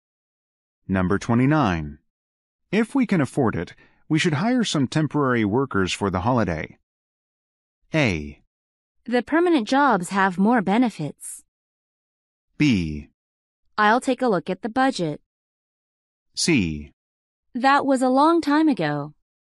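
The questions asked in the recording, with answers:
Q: If we can afford it, we should hire some temporary workers for the holiday.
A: B: I'll take a look at the budget.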